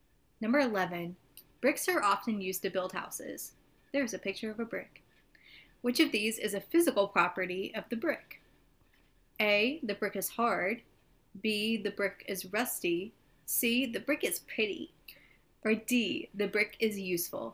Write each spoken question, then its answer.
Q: Which of these is a physical property of the brick?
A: So So it's hard.